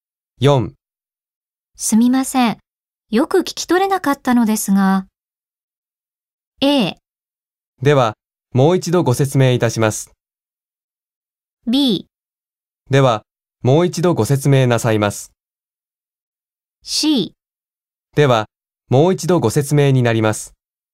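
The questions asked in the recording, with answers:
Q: すみません。よく聞き取れなかったのですが。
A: A: では、もう一度ご説明いたします。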